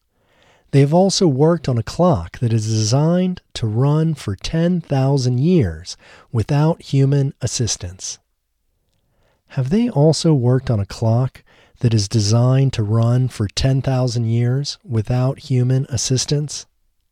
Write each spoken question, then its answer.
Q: Have they also worked on a clock that is designed to run for 10,000 years without human assistance?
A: Yes, they have also worked on a clock that is designed to run for 10,000 years without human assistance.